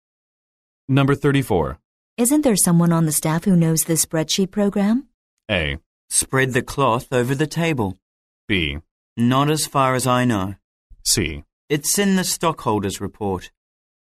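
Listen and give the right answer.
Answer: B: Not as far as I know.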